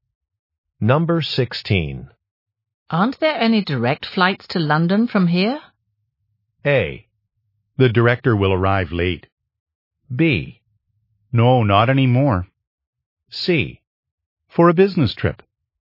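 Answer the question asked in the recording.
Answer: B: No, not anymore.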